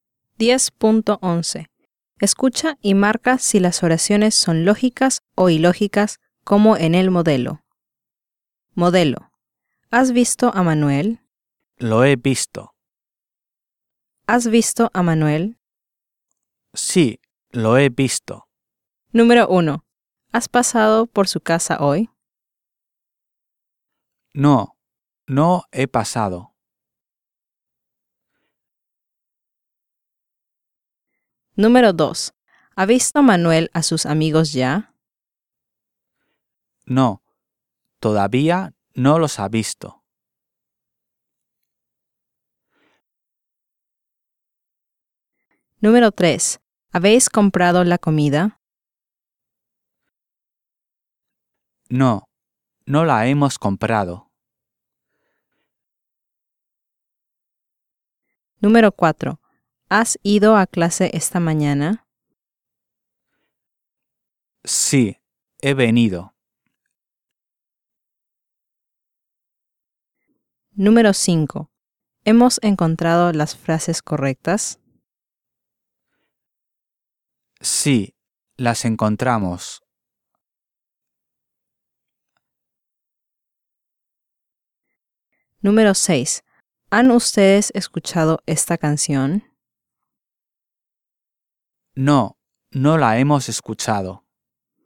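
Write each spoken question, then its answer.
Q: ¿Has pasado por su casa hoy? No, no he pasado.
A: lógica

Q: ¿Ha visto Manuel a sus amigos ya? No, todavía no los ha visto.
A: lógica

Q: ¿Habéis comprado la comida? No, no la hemos comprado.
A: lógica

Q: ¿Han ustedes escuchado esta canción? No, no la hemos escuchado.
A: lógica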